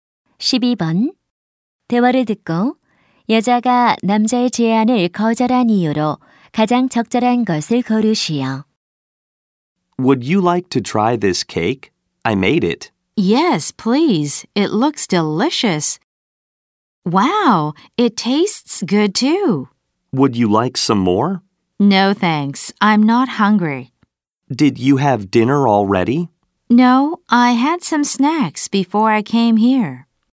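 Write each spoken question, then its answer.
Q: 대화를 듣고 여자가 남자의 제안을 거절한 이유로 가장 적절한 것을 고르시오.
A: 오기 전에 간식을 먹어서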